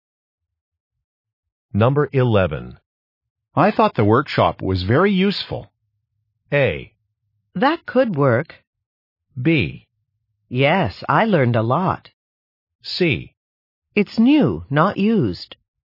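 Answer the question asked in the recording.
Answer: B: Yes, I learned a lot.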